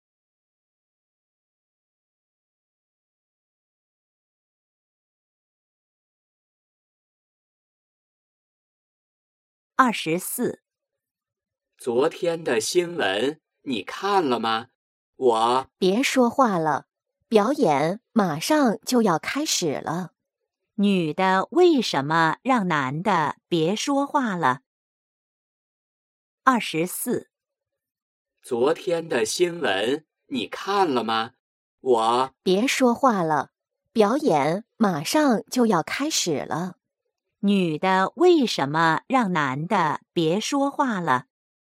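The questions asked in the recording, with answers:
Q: 女的为什么让男的别说话了?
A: 表演马上就要开始了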